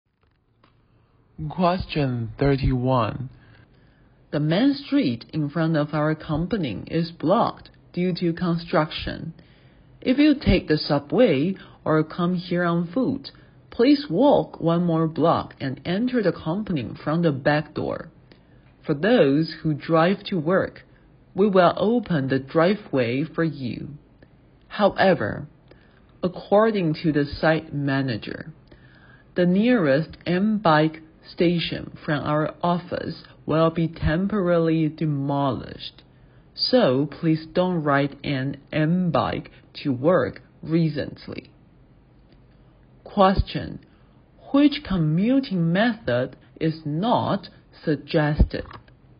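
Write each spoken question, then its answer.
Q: Which commuting method is not suggested?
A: Riding an M-bike to work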